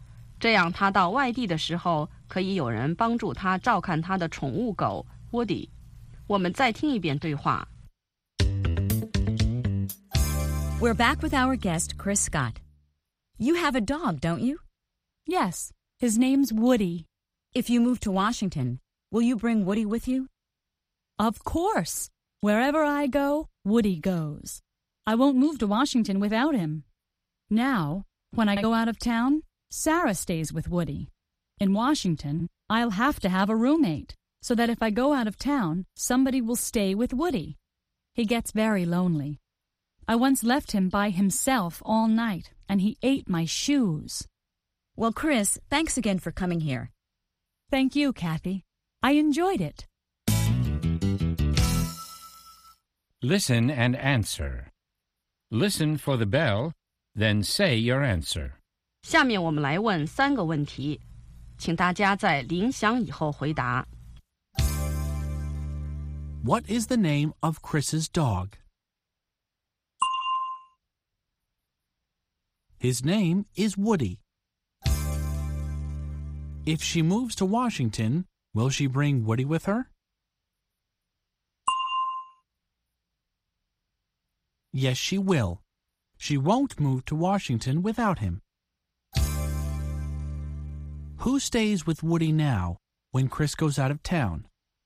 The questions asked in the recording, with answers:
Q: What is the name of Chris's dog?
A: His name is Woody.

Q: Who stays with Woody now when Chris goes out of town?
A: When Chris goes out of town, Sarah stays with Woody.